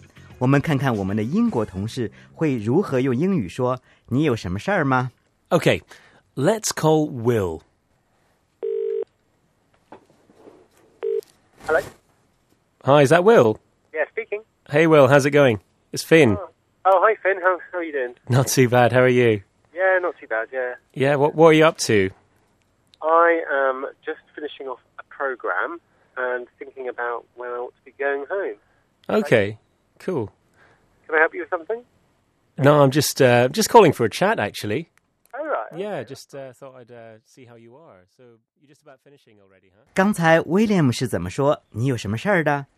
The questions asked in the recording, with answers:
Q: 刚才 William 是怎么说?你有什么事儿的?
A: William 说 ,Can I help you with something?